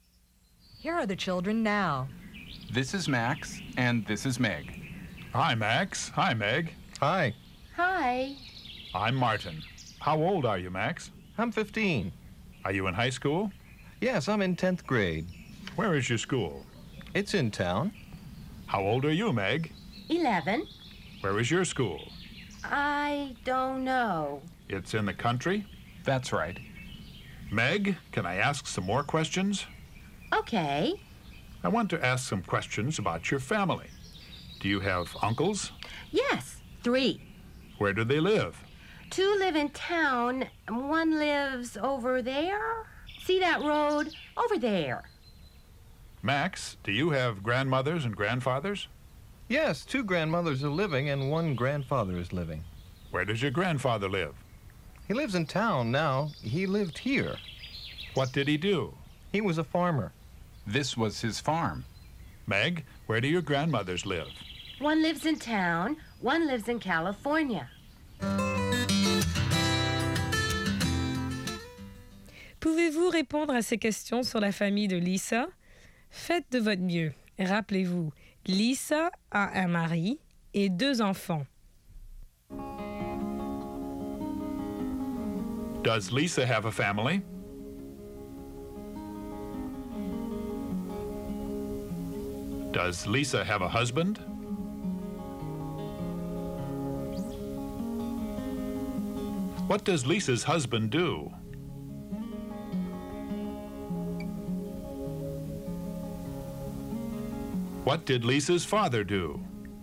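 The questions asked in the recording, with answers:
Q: Does Lisa have a family?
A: Yes, she does.

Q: Does Lisa have a husband?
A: Yes, she does.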